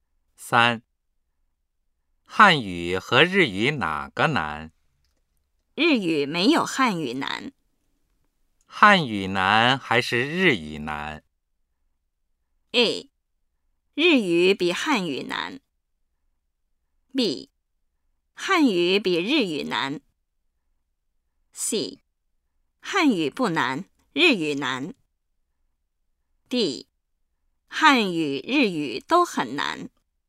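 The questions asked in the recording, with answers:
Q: 汉语难还是日语难?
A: B:汉语比日语难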